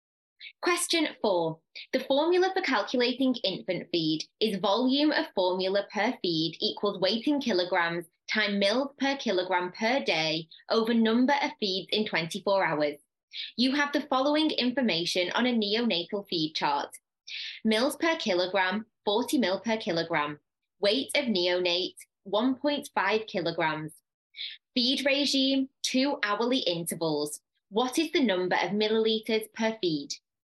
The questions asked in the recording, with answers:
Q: What is the number of milliliters per feed?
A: So then the answer would be 5 mils per feed.